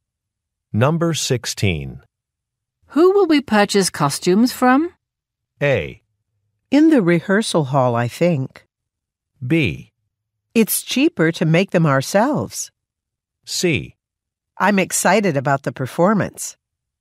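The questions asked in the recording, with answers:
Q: Who will we purchase costumes from?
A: B: It's cheaper to make them ourselves.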